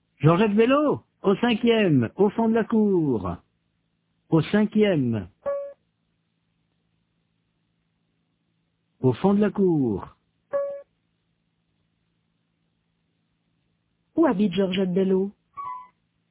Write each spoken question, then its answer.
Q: Où habite Georgette Bello ?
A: Au cinquième, au fond de la cour.